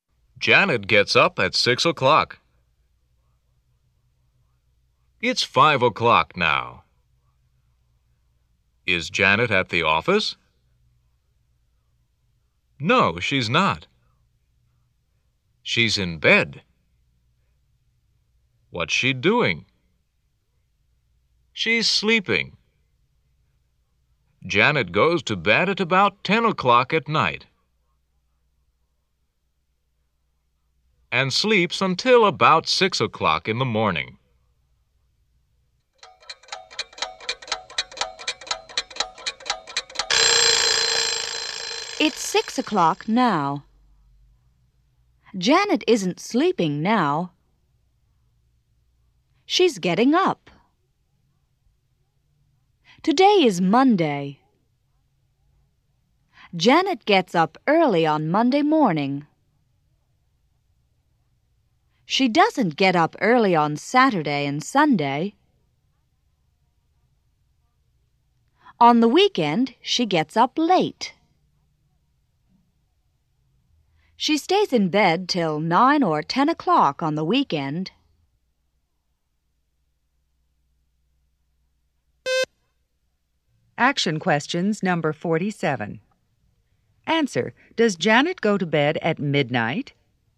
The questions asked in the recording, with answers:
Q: Answer, does Janet go to bed at midnight?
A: No, she doesn't.